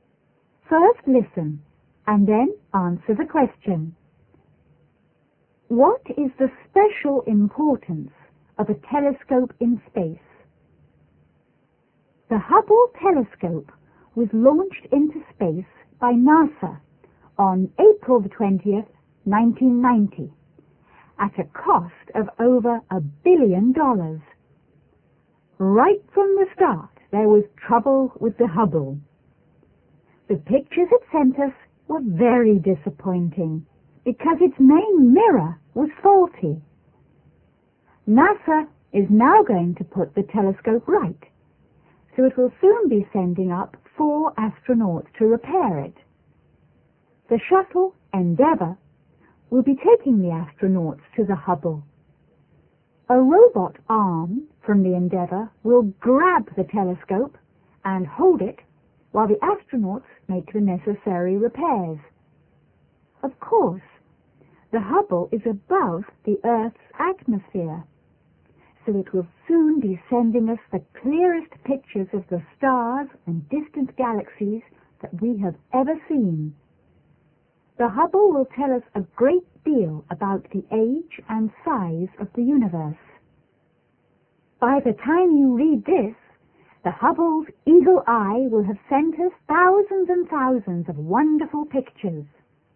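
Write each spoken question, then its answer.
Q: What is the special importance of a telescope in space?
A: It is above the Earth's atmosphere, so it can send the clearest pictures of the stars and distant galaxies.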